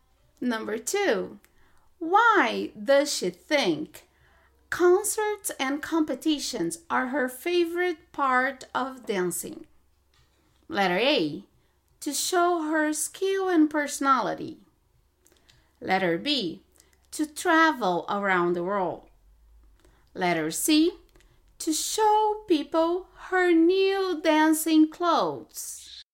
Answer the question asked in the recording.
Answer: Letter A is correct. To show her skill and personality.